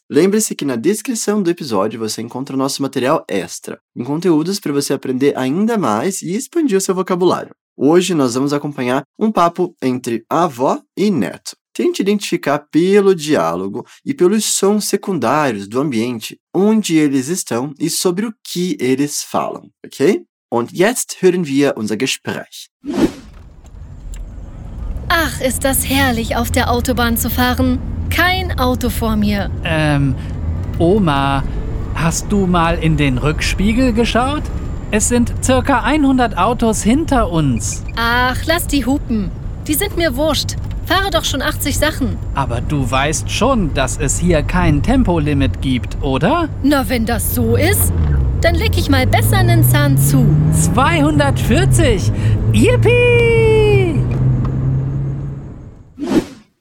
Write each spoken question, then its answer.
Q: Tente identificar pelo diálogo e pelos sons secundários do ambiente onde eles estão e sobre o que eles falam, ok?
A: Der Dialog passiert, während sie auf einer Autobahn fahren.